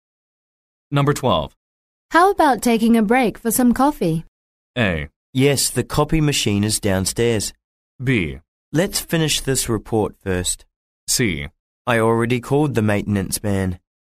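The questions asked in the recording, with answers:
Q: How about taking a break for some coffee?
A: B: Let's finish this report first.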